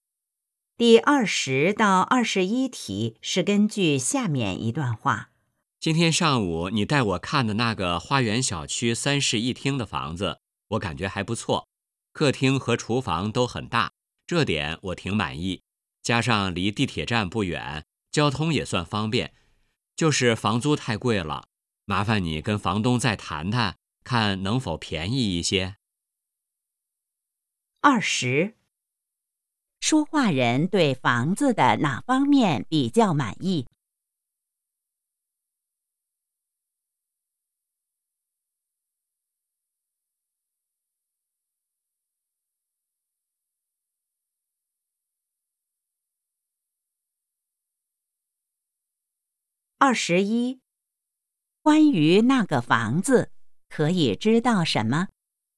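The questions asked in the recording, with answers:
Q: 说话人对房子的哪方面比较满意?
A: 客厅和厨房都很大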